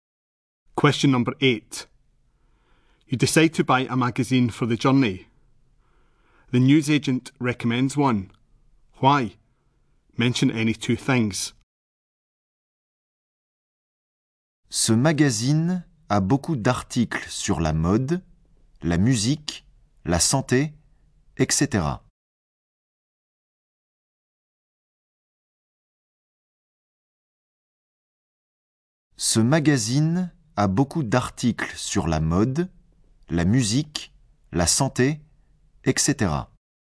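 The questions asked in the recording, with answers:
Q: Why? Mention any two things.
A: Lots of articles on fashion, music, health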